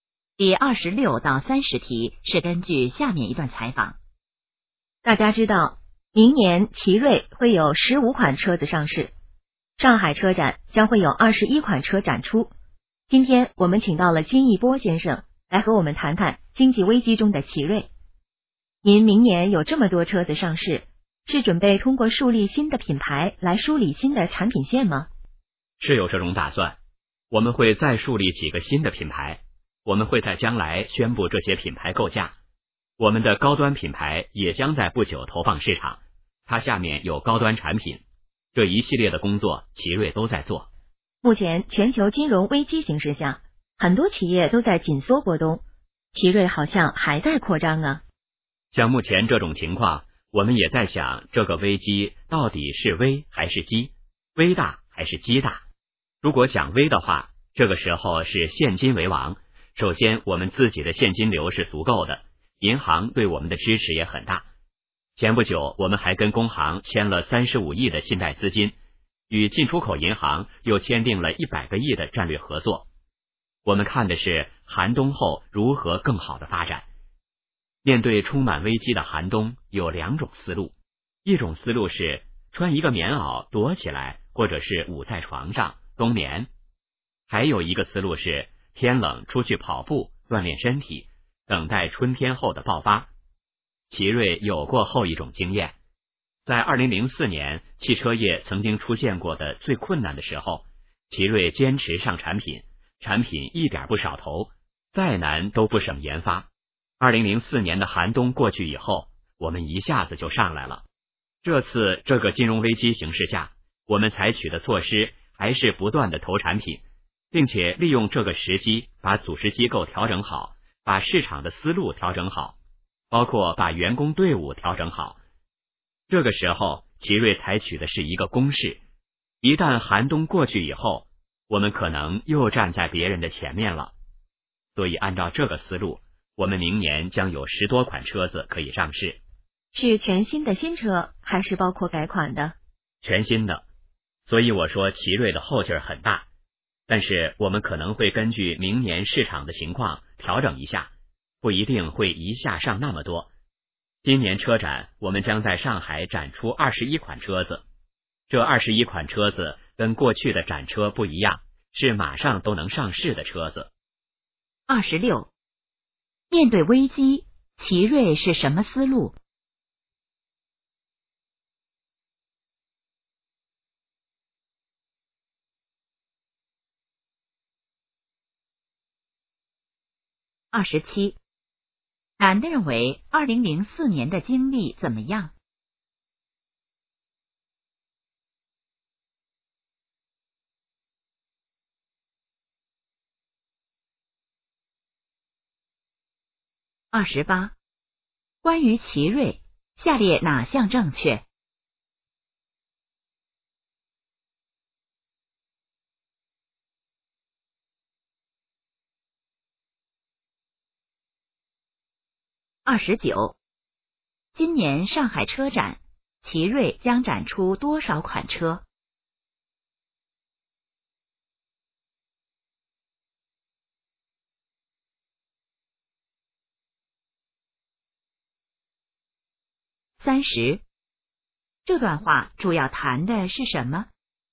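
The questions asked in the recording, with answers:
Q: 面对危机,奇瑞是什么思路?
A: 采取攻势,不断投产品,像天冷出去跑步锻炼

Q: 今年上海车展,奇瑞将展出多少款车?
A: 21款

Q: 这段话主要谈的是什么?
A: 经济危机中的奇瑞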